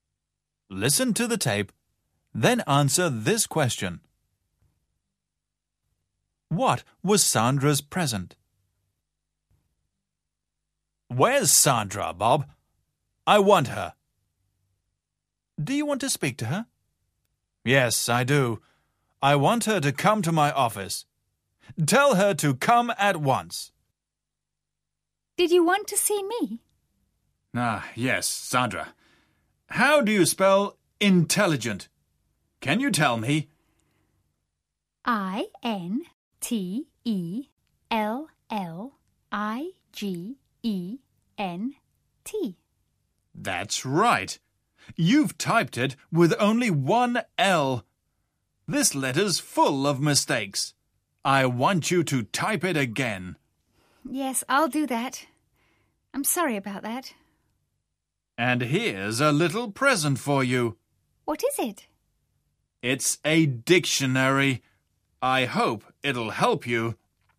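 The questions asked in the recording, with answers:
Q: What was Sandra's present?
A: A dictionary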